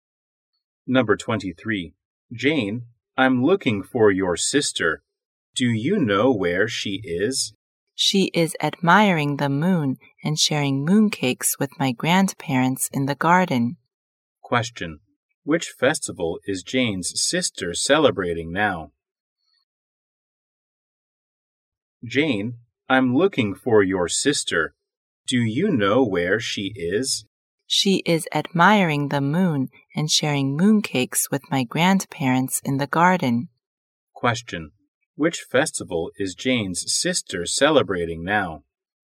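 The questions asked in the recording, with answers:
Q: Which festival is Jane's sister celebrating now?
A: The Mid-Autumn Festival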